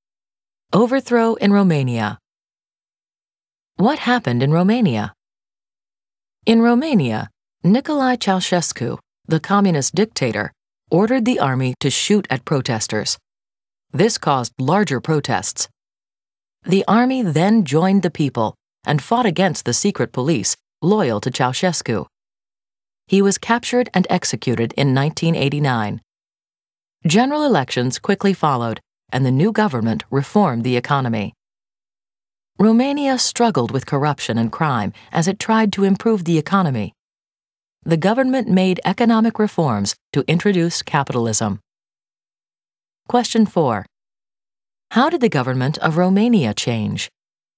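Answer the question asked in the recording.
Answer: Ceausescu was overthrown and executed; elections followed and a new government reformed the economy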